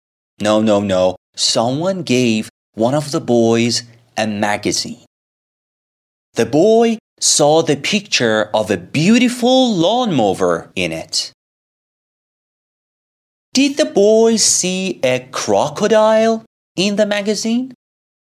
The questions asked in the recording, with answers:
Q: Did the boy see a crocodile in the magazine?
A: No. The boy saw the picture of a beautiful lawnmower.